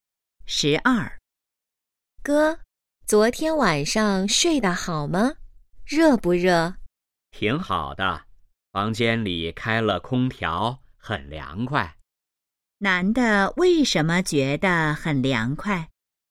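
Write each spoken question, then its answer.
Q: 男的为什么觉得很凉快?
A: 房间里开了空调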